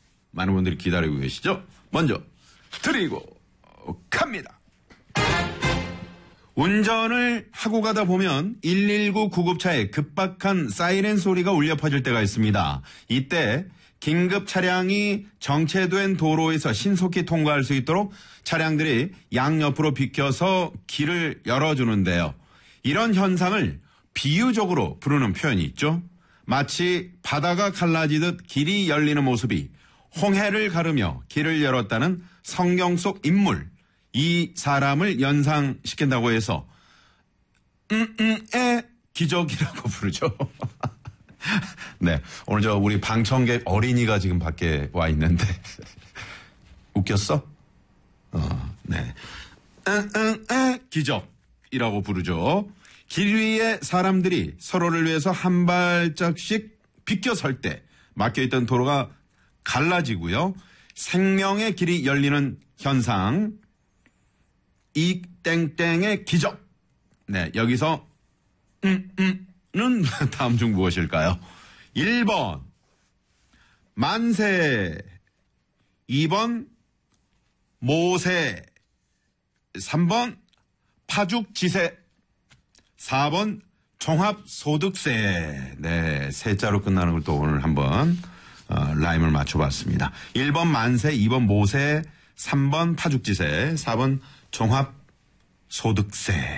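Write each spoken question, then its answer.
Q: 이 땡땡의 기적. 네, 여기서 는 다음 중 무엇일까요?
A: 2: 모세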